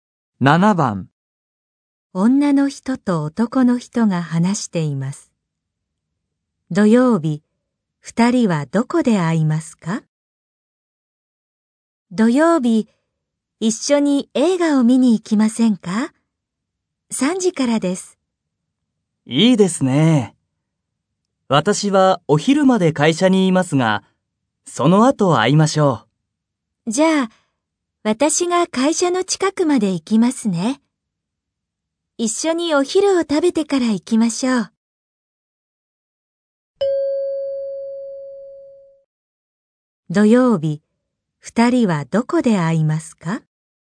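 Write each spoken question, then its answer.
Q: 土曜日、二人はどこで会いますか?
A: 会社の近く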